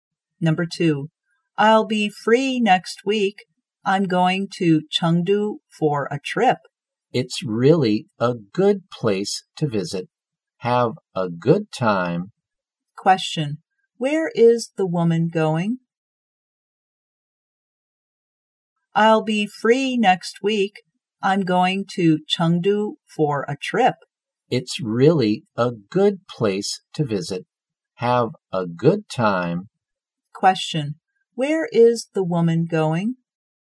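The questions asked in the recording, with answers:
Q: where is the woman going?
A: Chengdu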